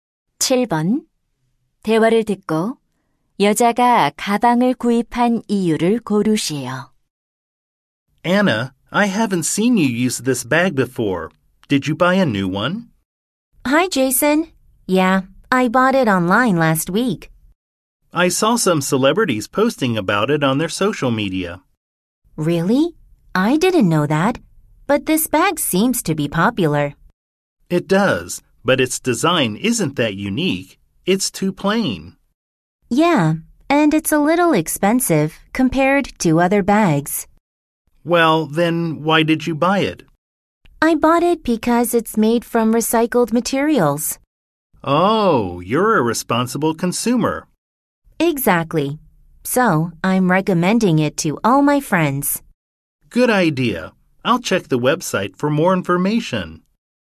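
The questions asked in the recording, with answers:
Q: 대화를 듣고 여자가 가방을 구입한 이유를 고르시오.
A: 재활용 소재로 만들어져서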